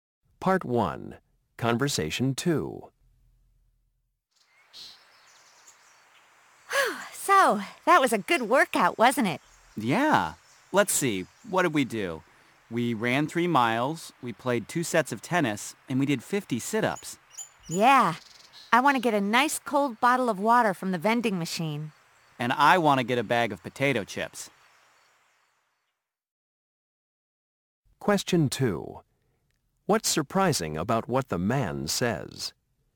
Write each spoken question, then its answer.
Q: What's surprising about what the man says?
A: I really don't understand why you eat junk like potato chips.